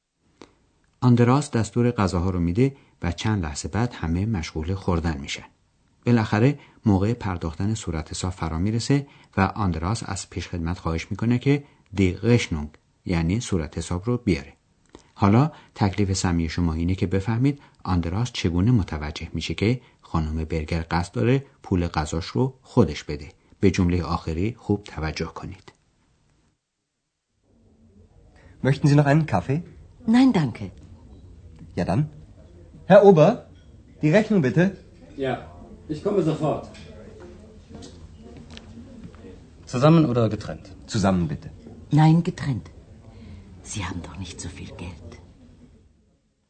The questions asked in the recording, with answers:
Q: حالا تکلیف سمی شما اینه که بفهمید آندراس چگونه متوجه میشه که خانم برگر قصد داره پول غذاش رو خودش بده.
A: ولی خانم برگر میخواد پول خودش رو خودش بده و لذا میگه نه، جداگانه.